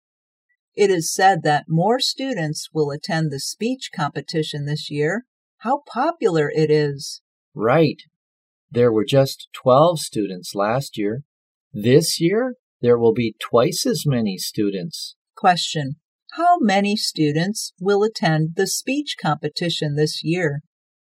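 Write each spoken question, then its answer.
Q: how many students will attend the speech competition this year?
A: 24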